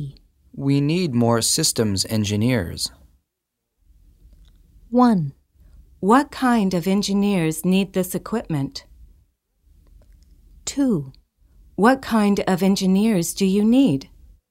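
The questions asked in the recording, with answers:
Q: We need more systems engineers.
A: 2: What kind of engineers do you need?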